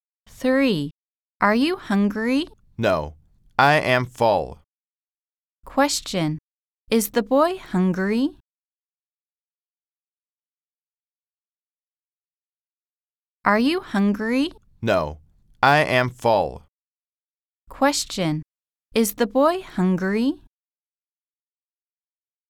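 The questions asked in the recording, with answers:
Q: Question. Is the boy hungry?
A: No, he is full.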